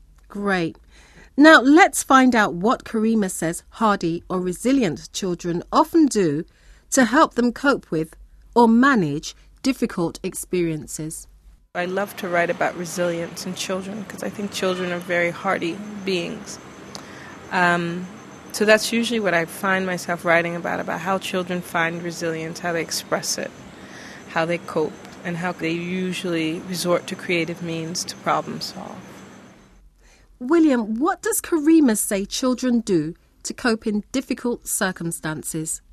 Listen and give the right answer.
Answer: She says that they usually resort to, or they turn to, creative means or new ideas to cope with their problems, because they can't find any other ways to do it.